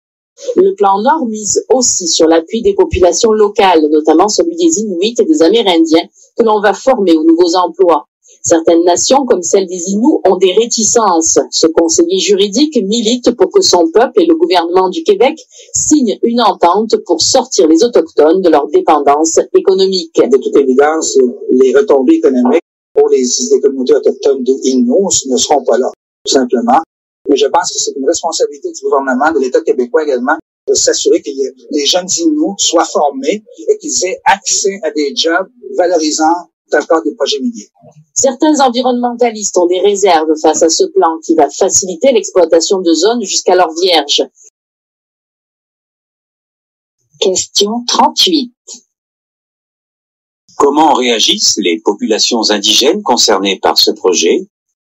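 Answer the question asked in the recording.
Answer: Certaines nations, comme les Inuits, ont des réticences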